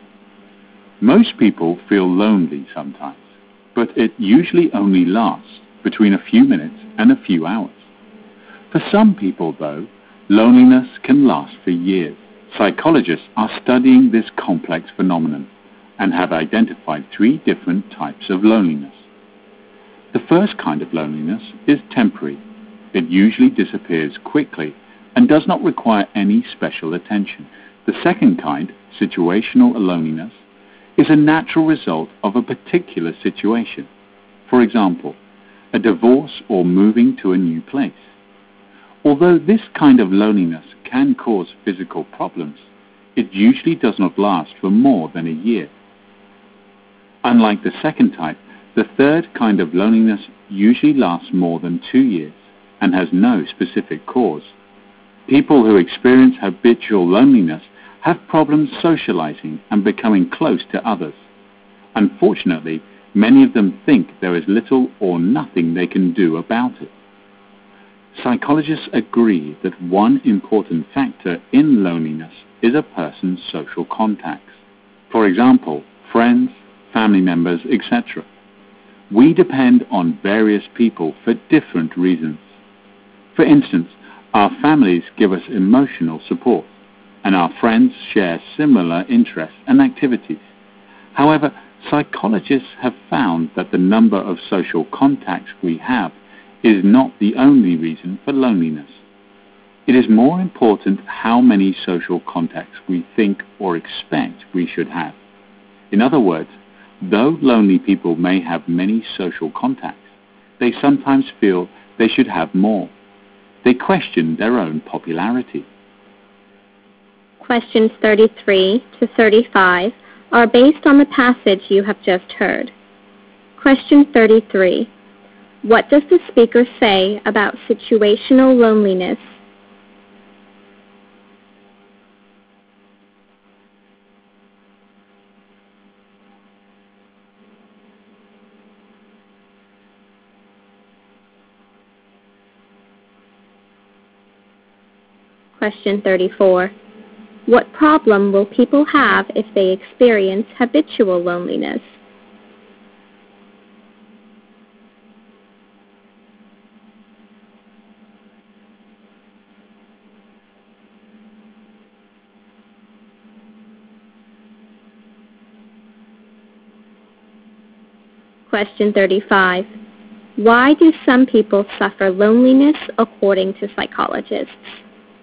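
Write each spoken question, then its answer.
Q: What does the speaker say about situational loneliness?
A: It results from a particular situation and usually lasts no more than a year.

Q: What problem will people have if they experience habitual loneliness?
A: They have trouble socializing and becoming close to others.

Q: Why do some people suffer loneliness according to psychologists?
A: They think they should have more social contacts.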